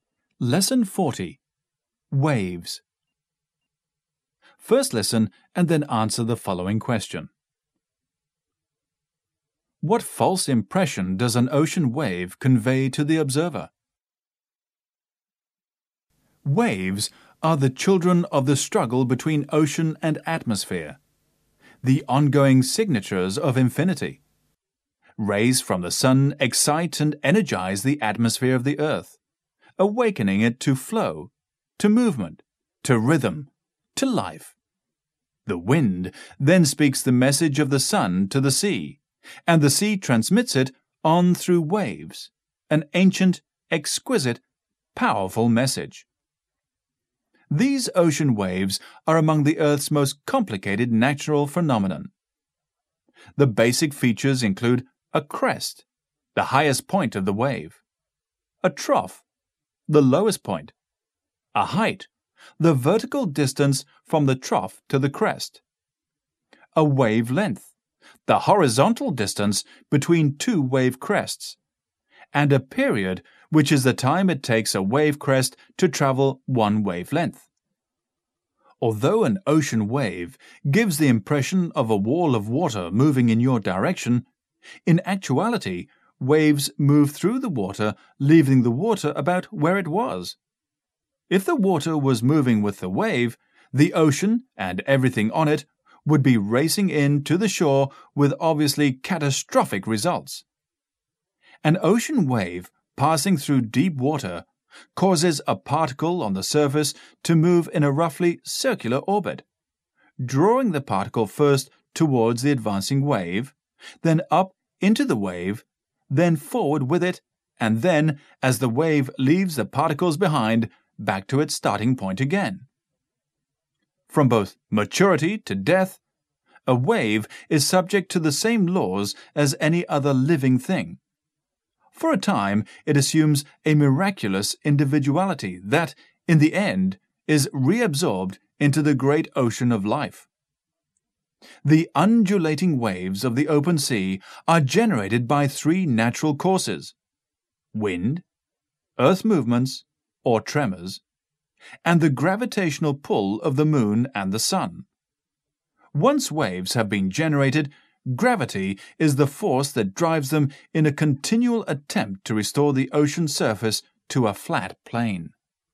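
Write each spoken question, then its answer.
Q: What false impression does an ocean wave convey to the observer?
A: That a wall of water is moving toward the observer, when in fact waves move through the water and leave it about where it was.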